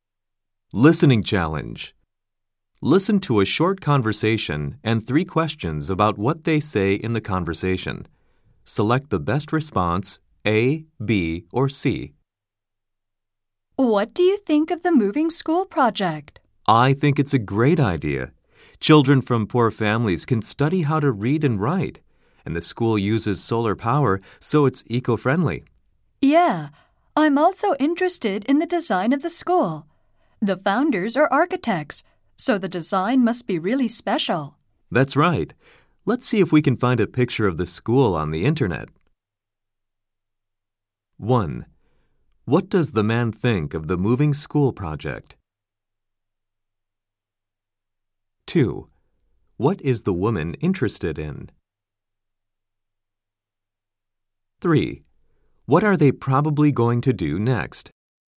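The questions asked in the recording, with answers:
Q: What are they probably going to do next?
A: Look for a picture of the school on the internet.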